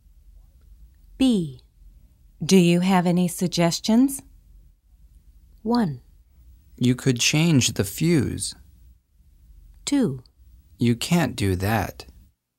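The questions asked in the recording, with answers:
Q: Do you have any suggestions?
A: 1: You could change the fuse.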